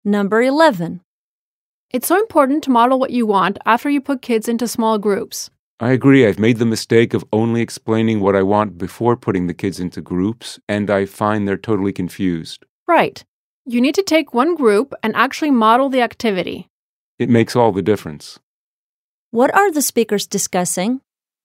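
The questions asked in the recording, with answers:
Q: What are the speakers discussing?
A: Modeling an activity for students after putting them into small groups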